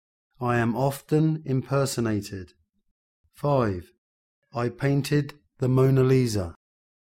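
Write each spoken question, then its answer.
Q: I painted the Mona Lisa.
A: Leonardo da Vinci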